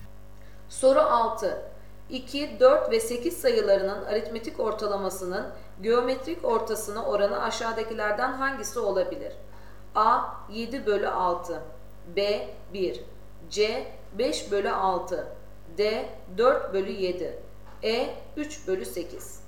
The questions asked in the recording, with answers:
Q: 2, 4 ve 8 sayılarının aritmetik ortalamasının geometrik ortasına oranı aşağıdakilerden hangisi olabilir?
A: Doğru cevap A 7 bölü 6.